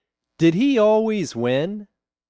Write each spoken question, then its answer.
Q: Did he always win?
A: No, he didn't always win.